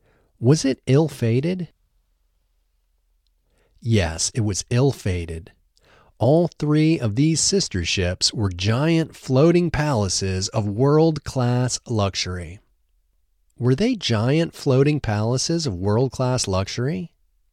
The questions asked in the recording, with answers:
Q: Were they giant floating palaces of world-class luxury?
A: Yes, they were giant floating palaces of world-class luxury.